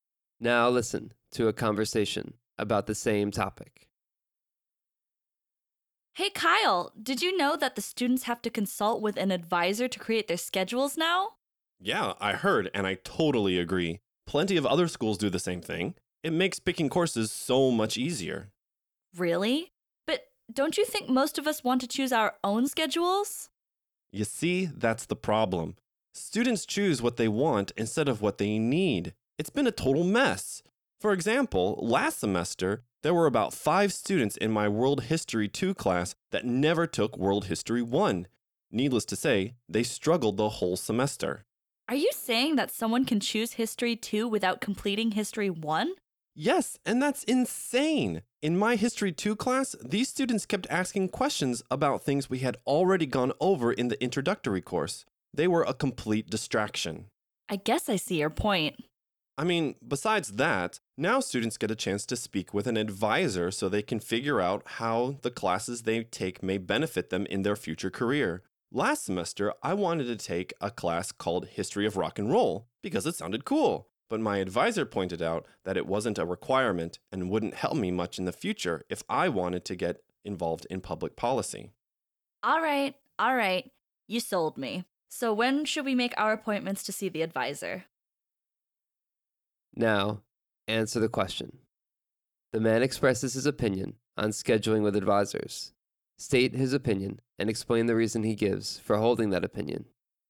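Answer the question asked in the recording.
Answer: He supports the new rule that students must see an advisor. Without advisors, students pick what they want instead of what they need, so some take courses like History 2 without the History 1 prerequisite. Advisors also help students choose classes that benefit their future careers.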